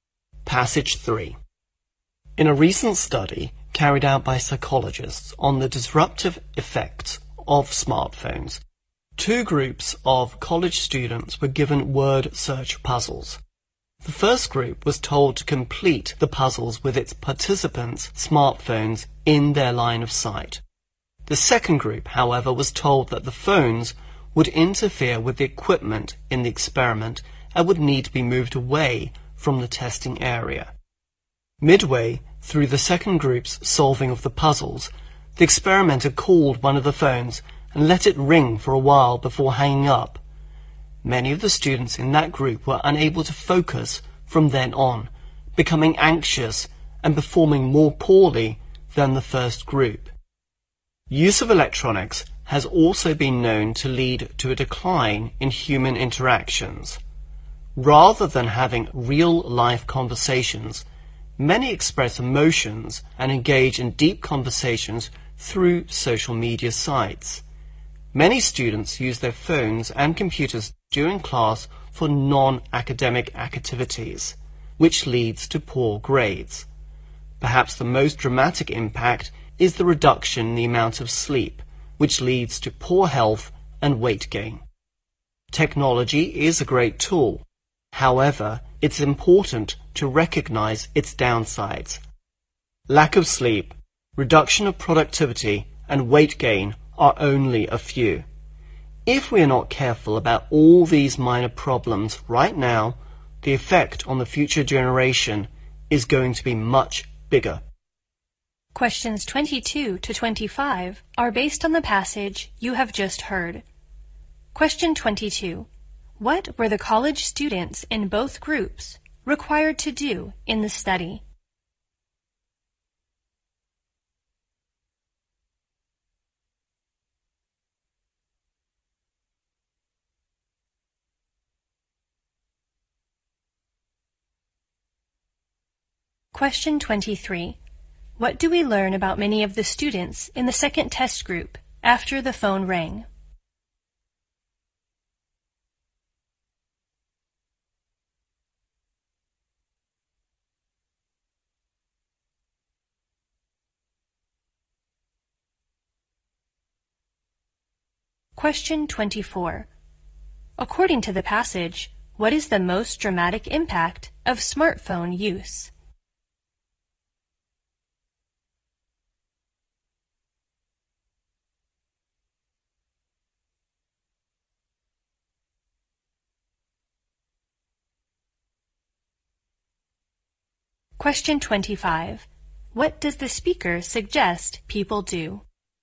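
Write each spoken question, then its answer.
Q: What were the college students in both groups required to do in the study?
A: Complete word search puzzles

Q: What do we learn about many of the students in the second test group after the phone rang?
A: They couldn't focus, became anxious and performed worse

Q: According to the passage, what is the most dramatic impact of smartphone use?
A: Reduced sleep

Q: What does the speaker suggest people do?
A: Recognize technology's downsides and be careful about them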